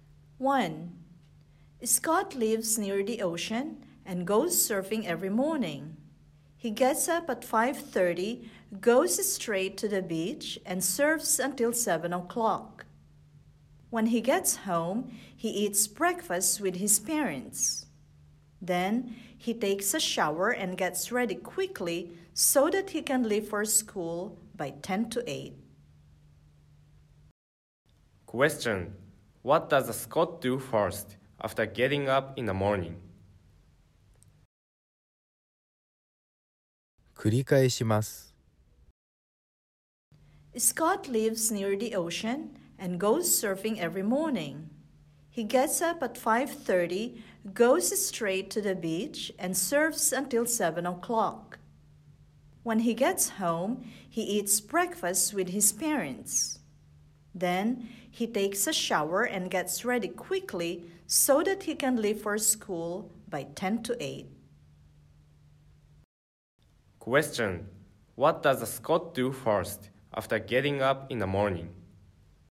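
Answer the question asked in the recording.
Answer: He goes surfing at the beach.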